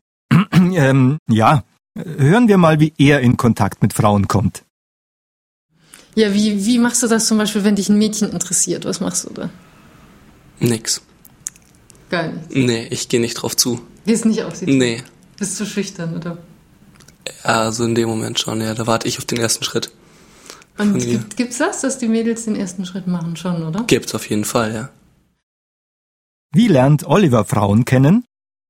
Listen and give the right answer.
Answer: Er wartet auf den ersten Schritt von der Frau.